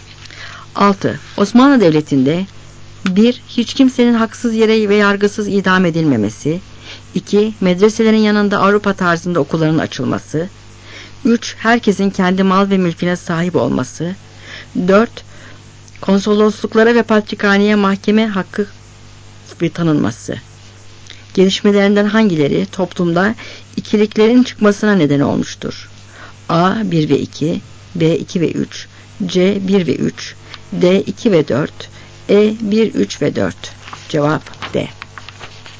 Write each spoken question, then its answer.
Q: Gelişmelerinden hangileri toplumda ikiliklerin çıkmasına neden olmuştur?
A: Cevap D.